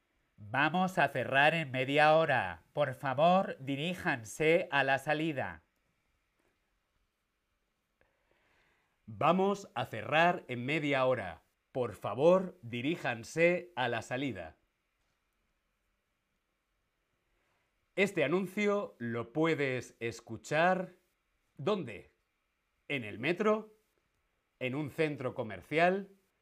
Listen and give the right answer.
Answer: estamos en el centro comercial